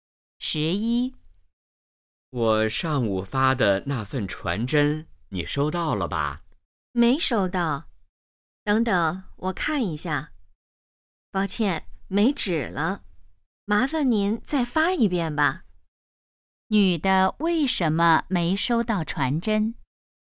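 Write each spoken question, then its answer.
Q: 女的为什么没收到传真?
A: 传真机没纸了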